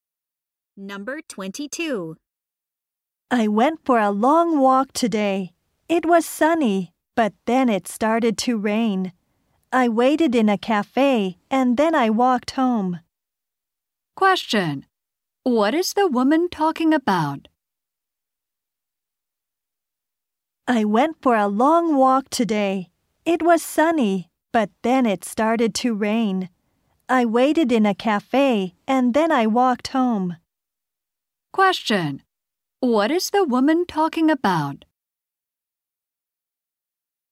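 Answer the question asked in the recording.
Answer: Her walk today.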